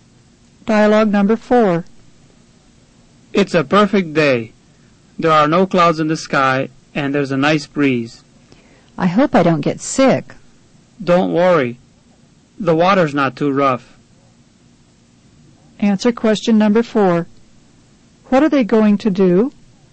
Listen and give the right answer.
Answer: Number 4 is B.